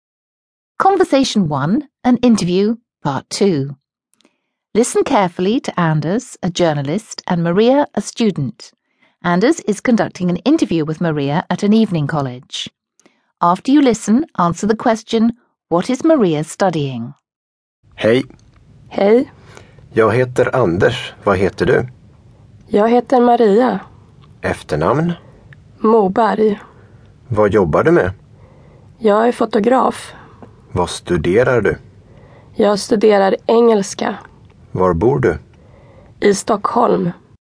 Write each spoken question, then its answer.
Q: what is Maria studying?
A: That's right, she's studying English.